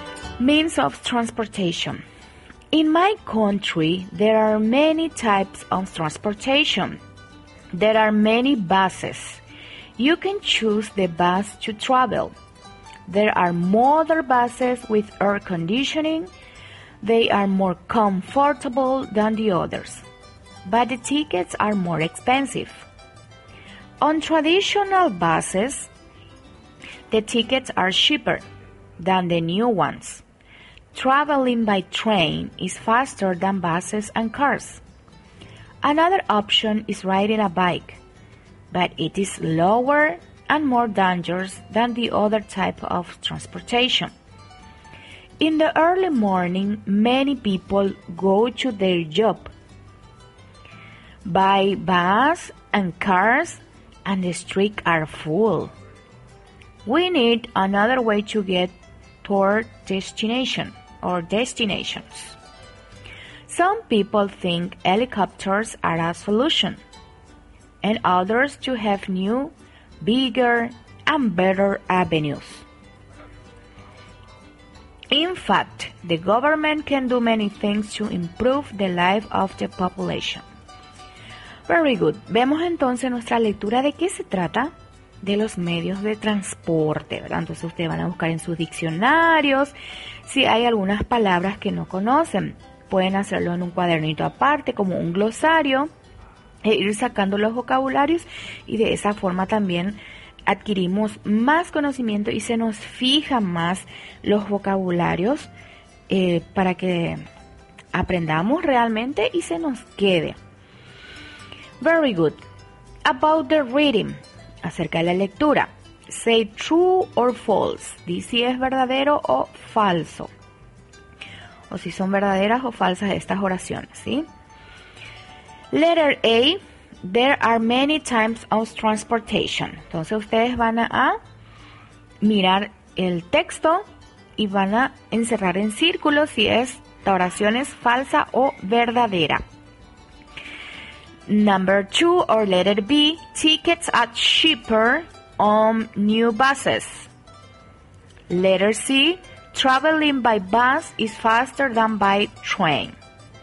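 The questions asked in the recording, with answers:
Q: There are many types of transportation.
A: True

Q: tickets are cheaper on new buses.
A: False

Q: traveling by bus is faster than by train.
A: False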